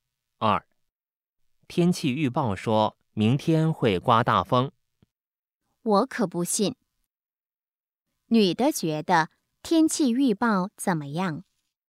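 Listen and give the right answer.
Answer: 不可信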